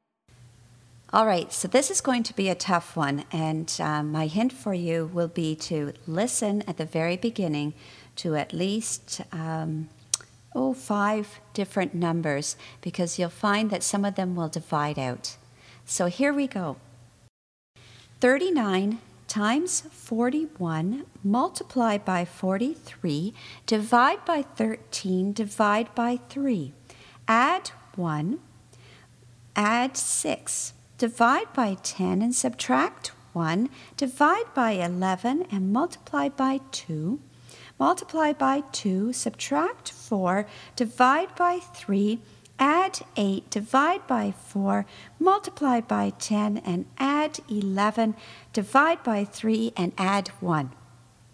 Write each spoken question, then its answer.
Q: 39 times 41, multiply by 43, divide by 13, divide by 3. Add 1, add 6, divide by 10 and subtract 1, divide by 11 and multiply by 2. Multiply by 2, subtract 4, divide by 3, add 8, divide by 4, multiply by 10, and add 11, divide by 3, and add 1.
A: And the answer is 28.